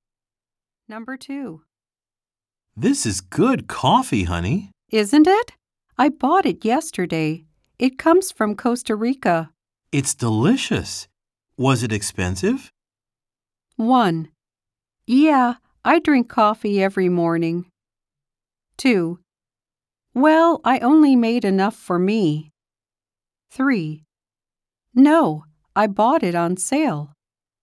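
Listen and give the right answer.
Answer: 3: No, I bought it on sale.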